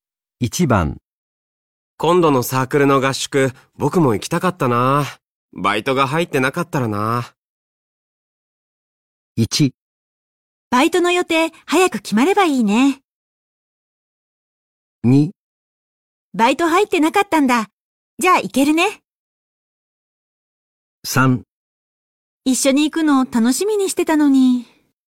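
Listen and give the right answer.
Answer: 3: 一緒に行くの楽しみにしてたのに。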